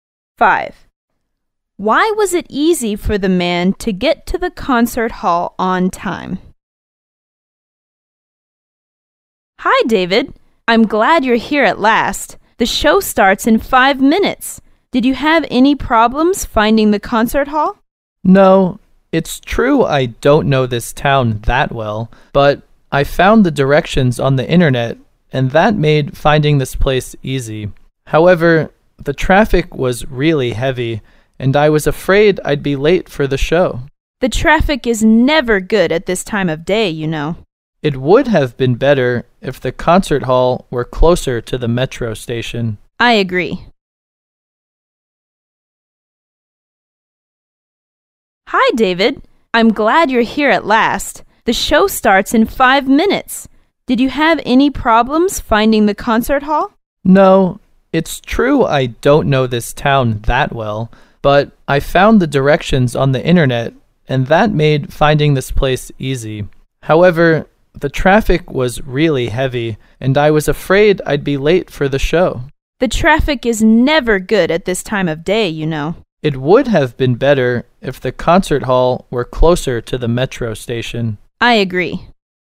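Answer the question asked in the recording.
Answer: He found the directions on the internet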